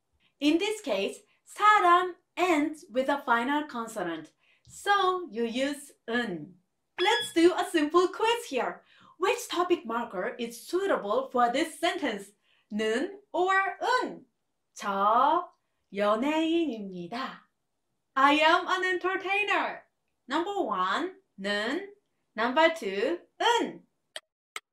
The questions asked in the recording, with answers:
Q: Which topic marker is suitable for this sentence? 는 or 은? 저 연예인입니다. I am an entertainer. Number 1, 는. Number 2, 은.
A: The answer is number 1, 는.